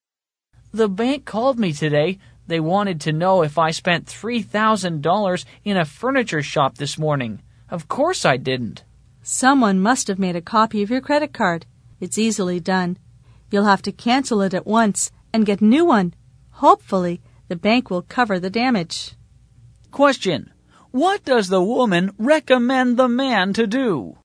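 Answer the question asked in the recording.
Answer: Cancel the credit card at once and get a new one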